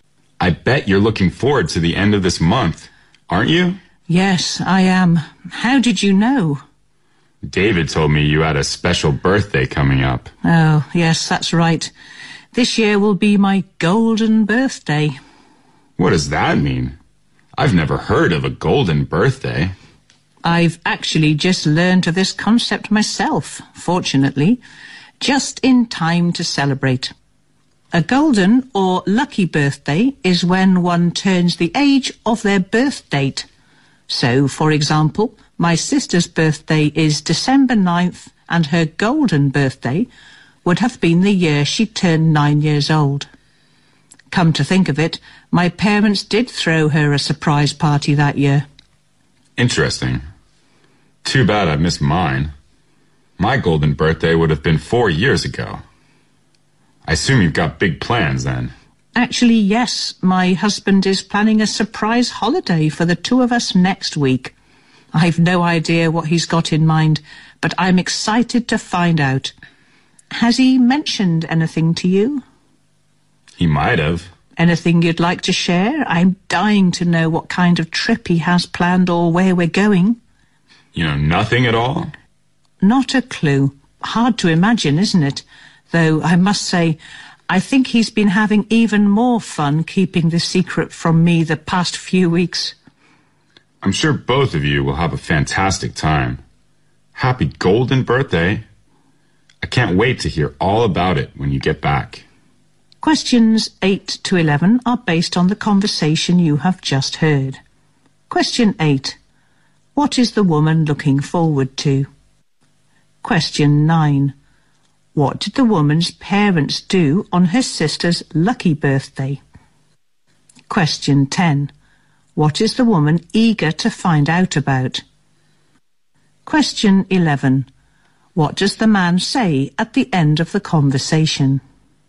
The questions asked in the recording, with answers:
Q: What is the woman looking forward to?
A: The woman is looking forward to her coming birthday, which is a golden birthday.

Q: What did the woman's parents do on her sister's lucky birthday?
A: Well, they threw a surprise party to her sister on her sister's 9th birthday.

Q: What is the woman eager to find out about?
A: She is eager to find out the holiday plan her husband is keeping from her for her golden birthday.

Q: What does the man say at the end of the conversation?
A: I couldn't wait to hear all about it when you are back